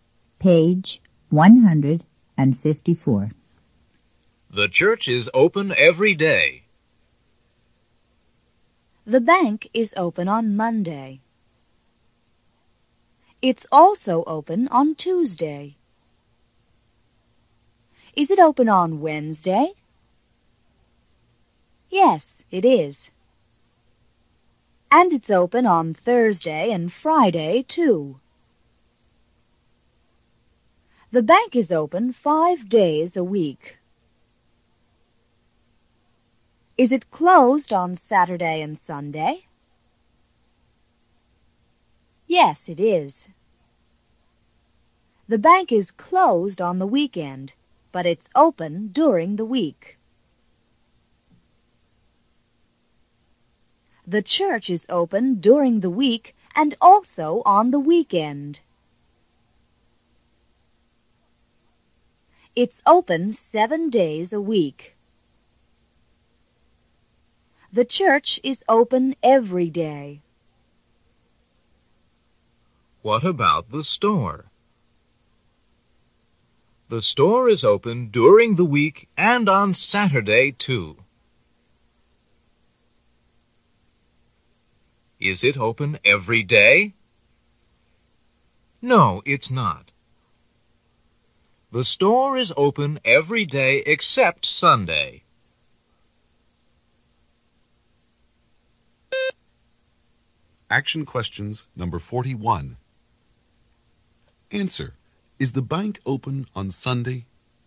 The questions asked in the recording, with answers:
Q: Is the bank open on Sunday?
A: No, it's not.